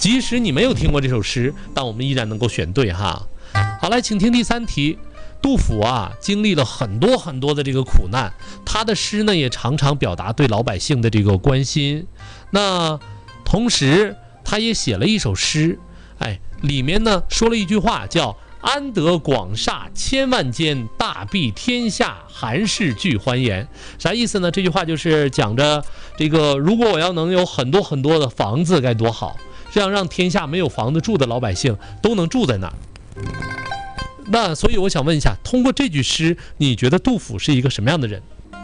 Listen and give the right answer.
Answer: 很善良,心怀百姓的人,是吧?